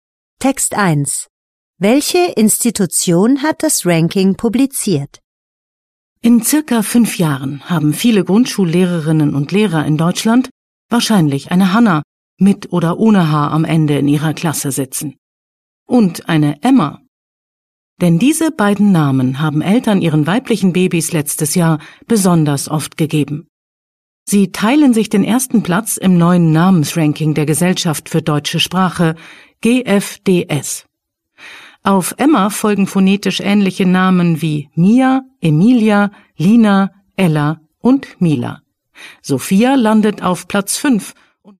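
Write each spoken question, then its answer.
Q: Welche Institution hat das Ranking publiziert?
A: Die Gesellschaft für deutsche Sprache (GfdS)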